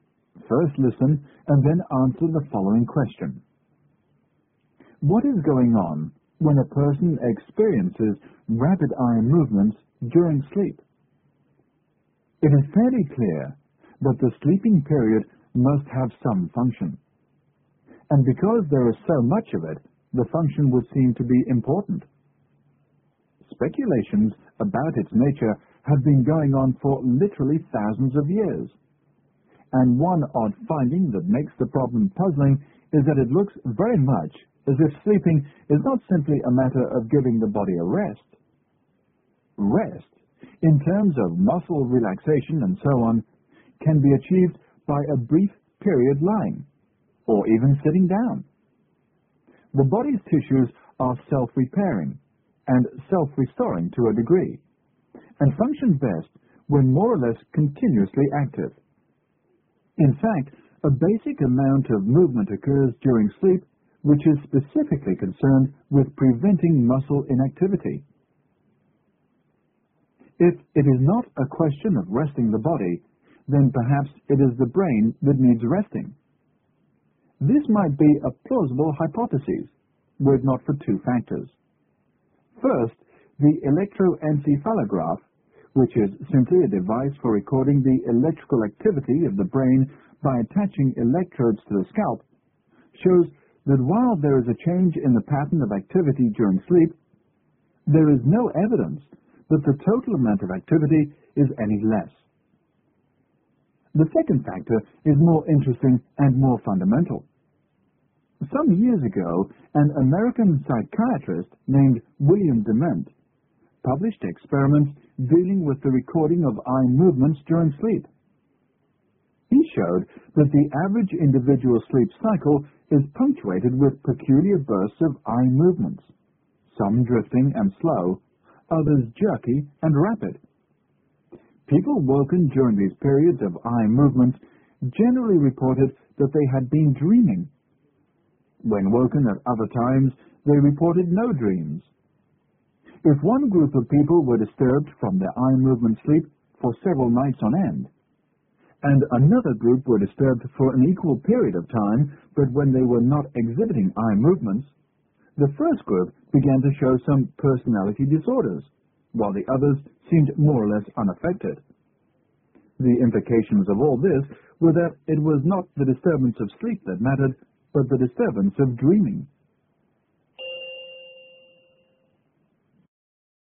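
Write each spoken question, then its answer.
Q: What is going on when a person experiences rapid eye movements during sleep?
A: The person is dreaming.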